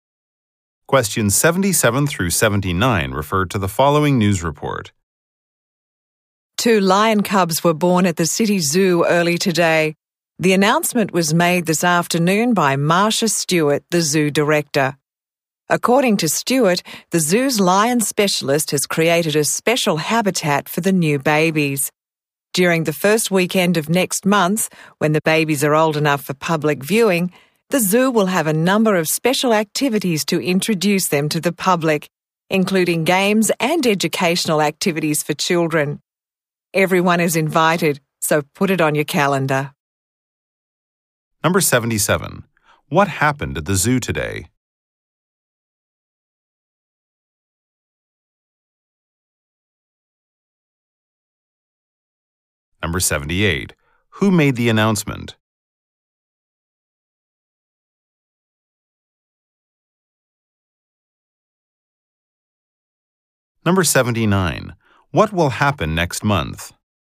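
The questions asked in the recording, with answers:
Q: What happened at the zoo today?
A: Two lion cubs were born.

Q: Who made the announcement?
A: The zoo director.

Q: What will happen next month?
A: Special activities to introduce the cubs to the public.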